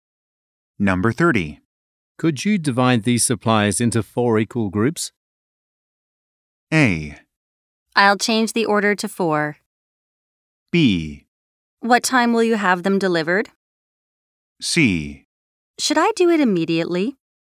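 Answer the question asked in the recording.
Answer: C: Should I do it immediately?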